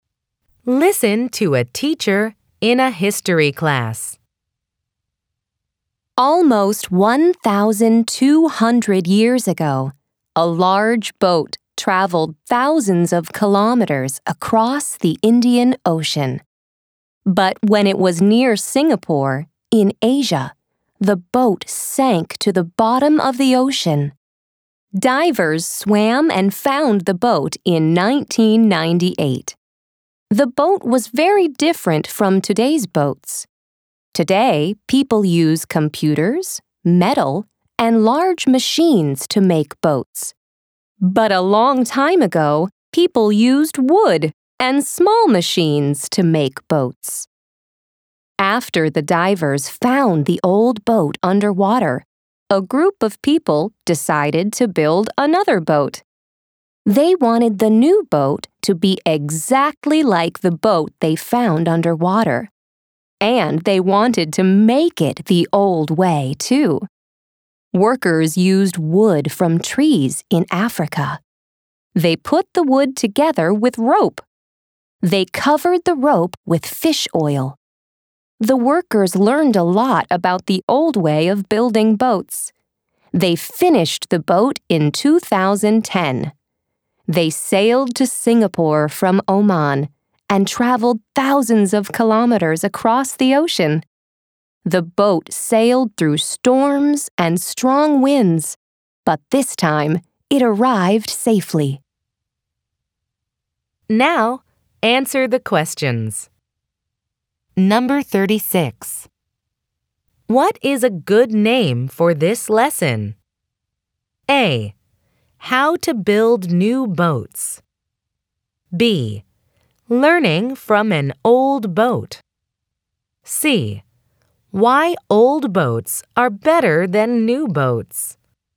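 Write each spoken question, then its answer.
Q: What is a good name for this lesson?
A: B: Learning from an old boat.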